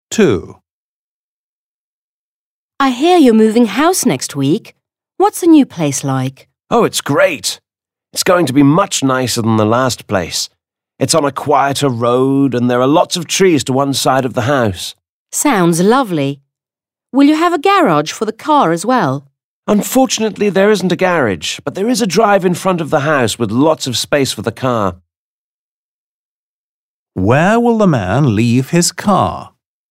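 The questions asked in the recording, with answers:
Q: Where will the man leave his car?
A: On the drive in front of the house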